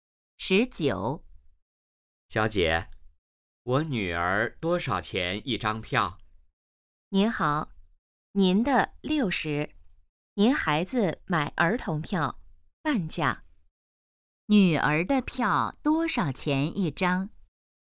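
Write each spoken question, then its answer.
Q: 女儿的票多少钱一张?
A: 30元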